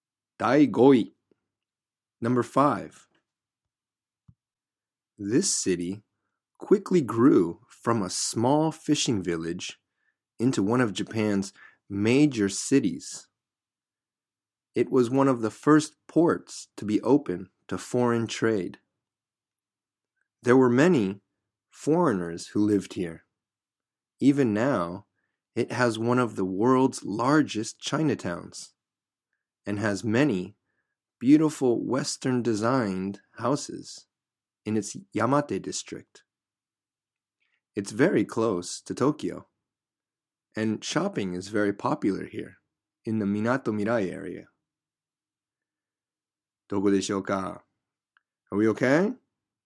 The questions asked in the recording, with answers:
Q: どこでしょうか?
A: Number 5 was Yokohama.